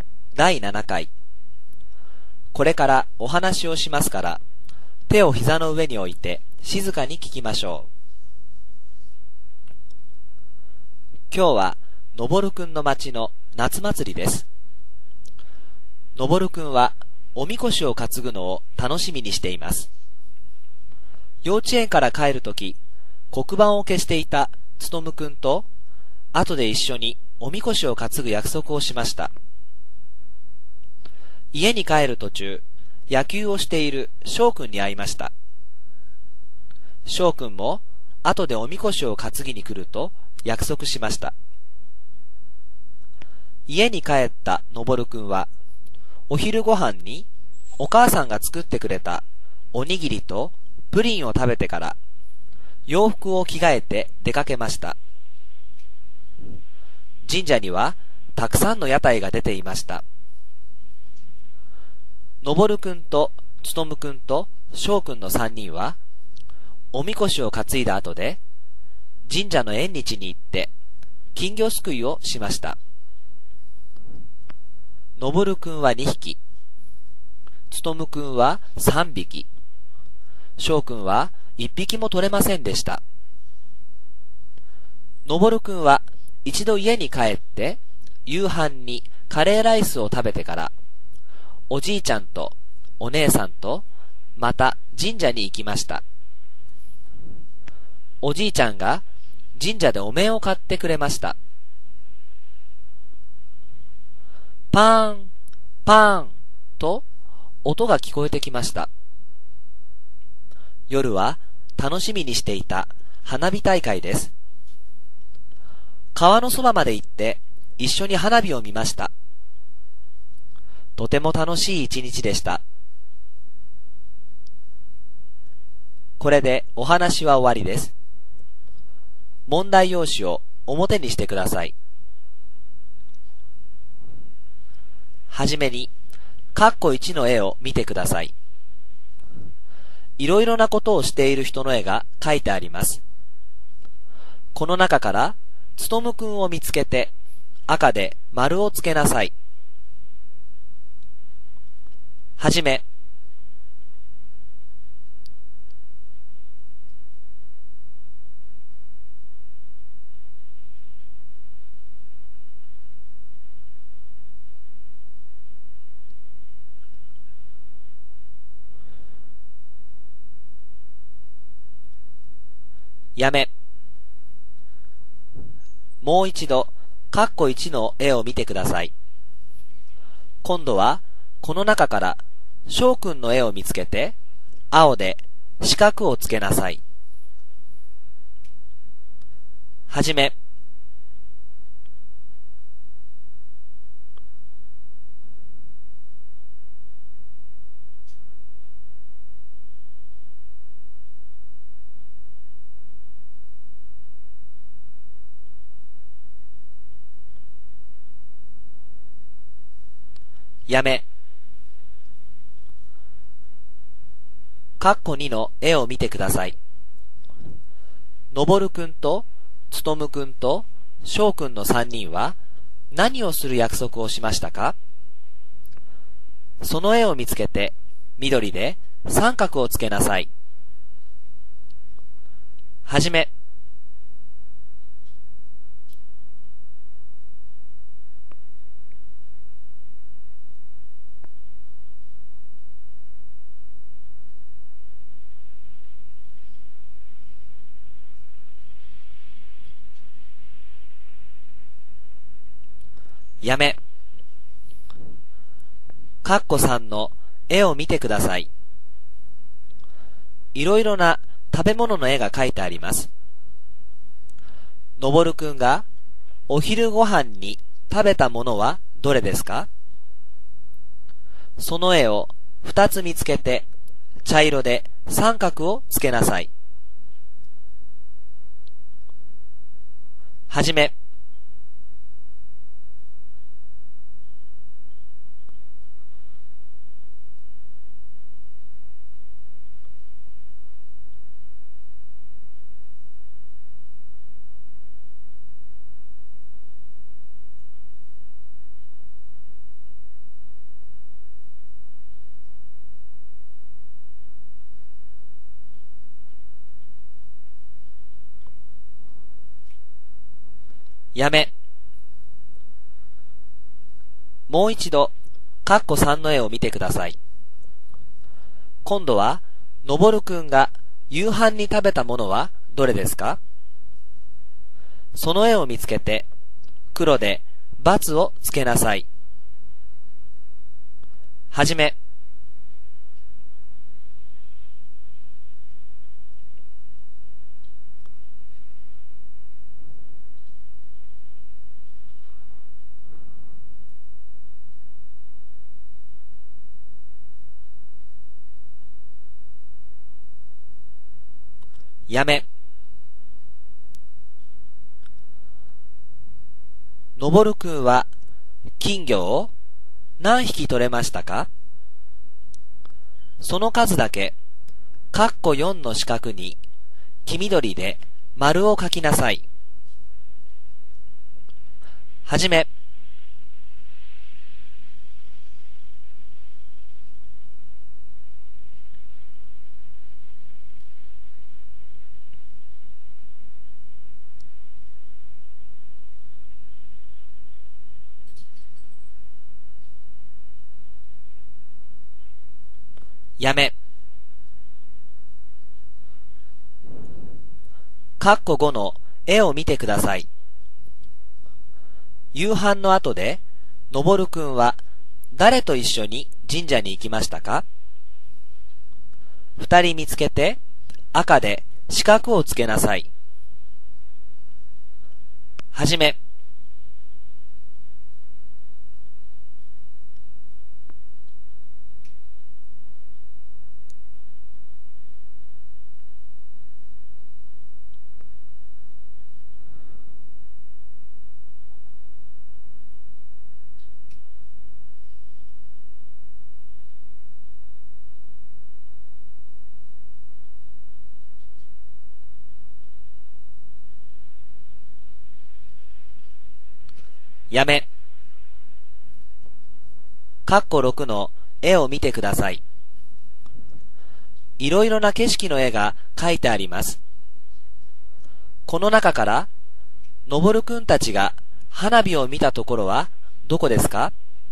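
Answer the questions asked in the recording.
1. おみこしを担ぐ
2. おにぎりとプリン
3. カレーライス
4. 2匹
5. おじいちゃんとお姉さん
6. 川のそば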